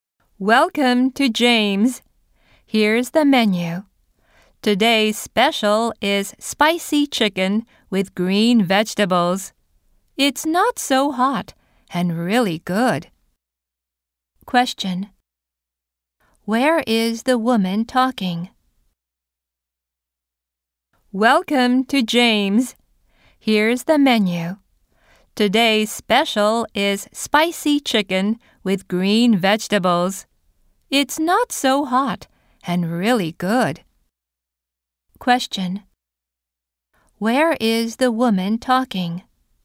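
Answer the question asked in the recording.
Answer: At a restaurant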